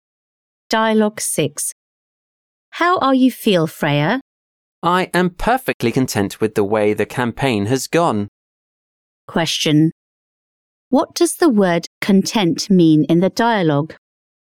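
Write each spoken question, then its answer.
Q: What does the word content mean in the dialogue?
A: satisfied, happy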